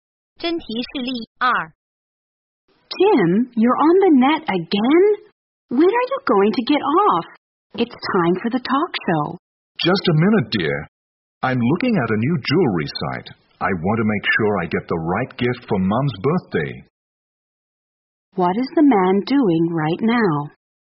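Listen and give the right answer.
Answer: Looking at a jewelry website to pick a birthday gift for his mother.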